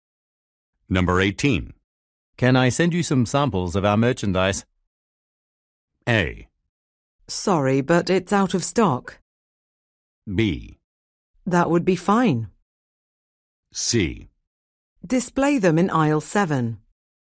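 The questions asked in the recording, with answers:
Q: Can I send you some samples of our merchandise?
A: B: That would be fine.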